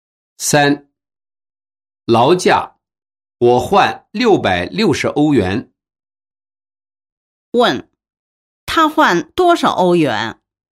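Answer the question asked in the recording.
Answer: 660欧元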